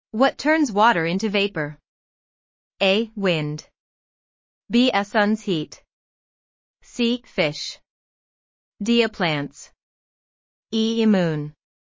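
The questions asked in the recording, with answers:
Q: What turns water into vapor?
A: B: A sun's heat.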